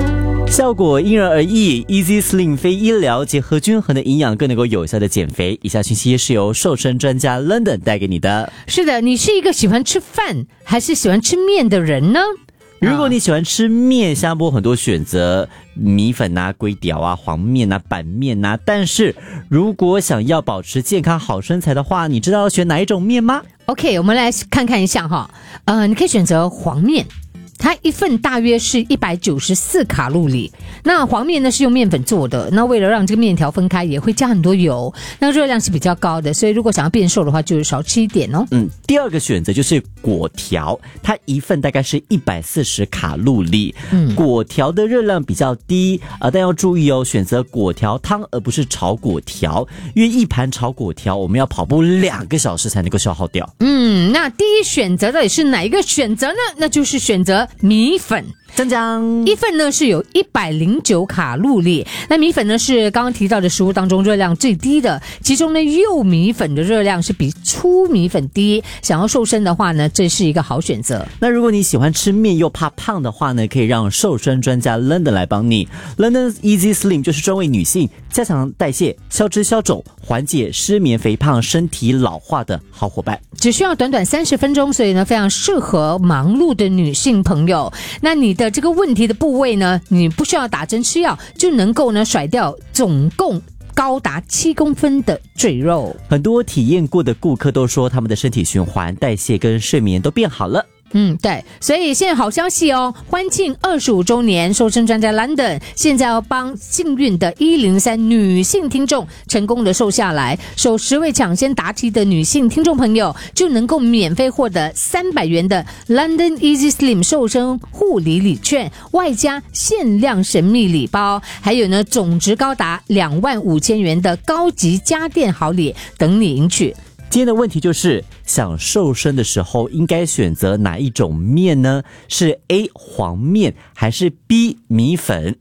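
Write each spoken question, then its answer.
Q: 今天的问题就是,想瘦身的时候应该选择哪一种面呢?是 A 黄面还是 B 米粉?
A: B: 米粉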